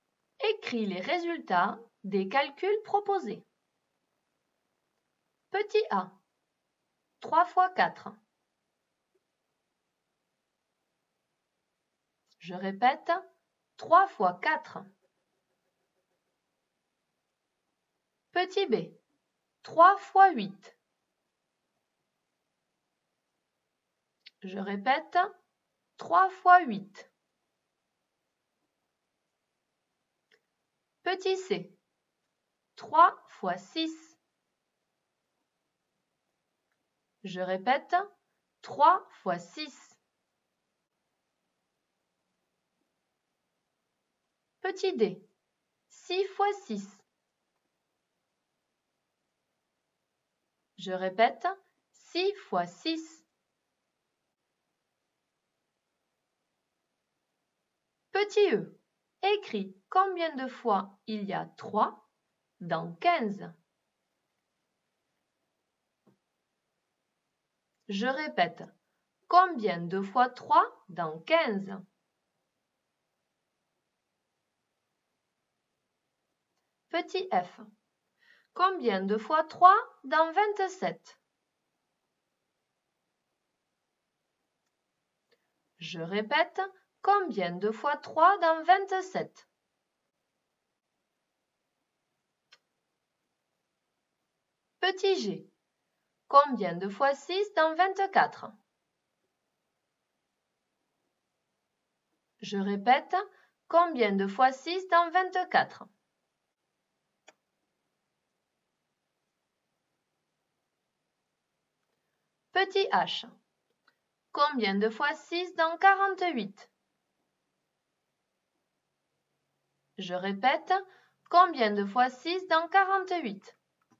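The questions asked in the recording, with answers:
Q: 3 fois 4.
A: 12

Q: 3 fois 8.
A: 24

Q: 3 fois 6.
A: 18

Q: 6 fois 6.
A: 36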